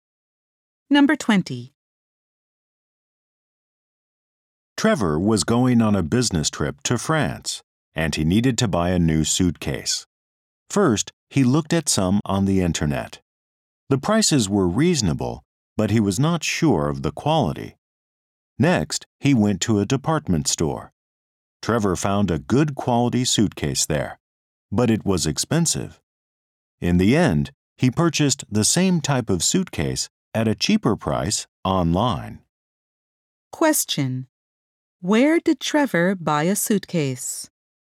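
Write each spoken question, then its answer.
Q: Where did Trevor buy a suitcase?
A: Online.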